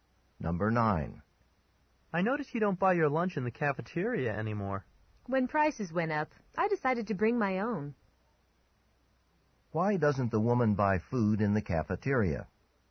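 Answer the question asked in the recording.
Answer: The prices went up.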